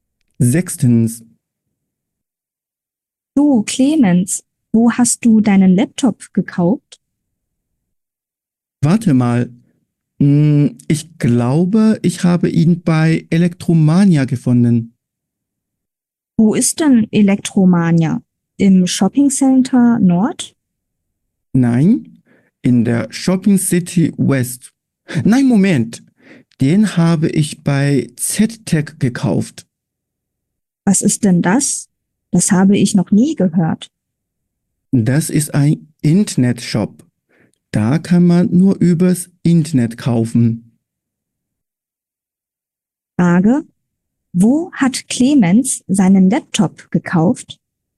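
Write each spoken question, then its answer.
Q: Wo hat Clemens seinen Laptop gekauft?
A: bei ZTech, einem Internetshop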